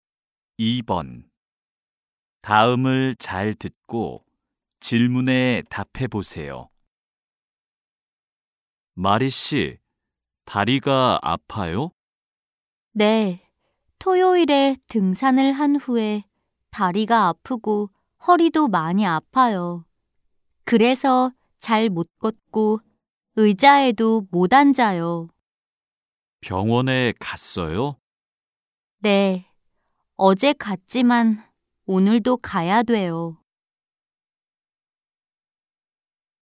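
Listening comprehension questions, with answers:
[18-1~18-2] 다음을 잘 듣고 질문에 답해 보세요.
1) 마리 씨는 토요일에 무엇을 했어요?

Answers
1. 등산

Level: 1B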